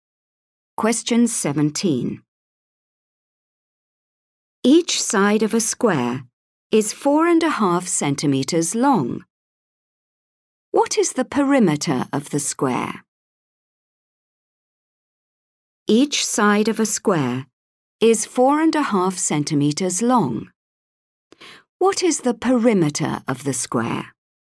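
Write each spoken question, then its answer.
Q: What is the perimeter of the square?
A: 18 centimeters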